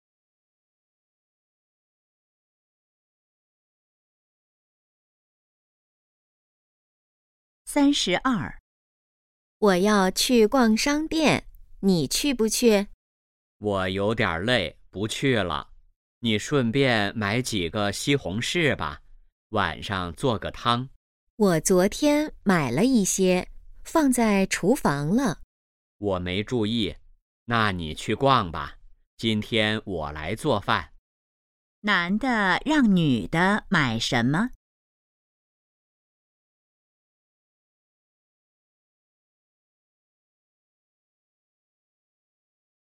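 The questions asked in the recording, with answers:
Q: 男的让女的买什么?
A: 西红柿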